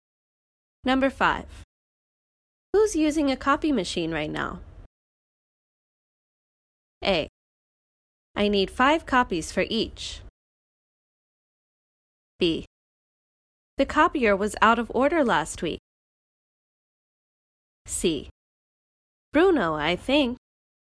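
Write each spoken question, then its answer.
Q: Who's using a copy machine right now?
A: C: Bruno, I think.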